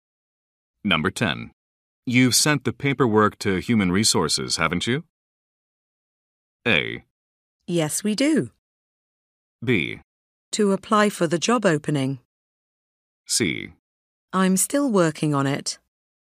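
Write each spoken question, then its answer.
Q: You've sent the paperwork to Human Resources, haven't you?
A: C: I'm still working on it.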